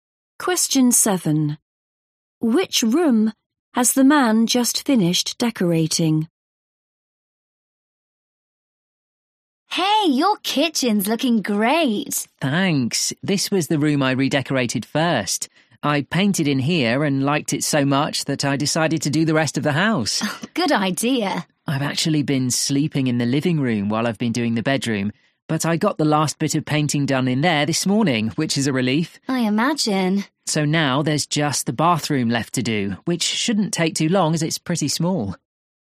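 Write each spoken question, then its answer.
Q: Which room has the man just finished decorating?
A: The bedroom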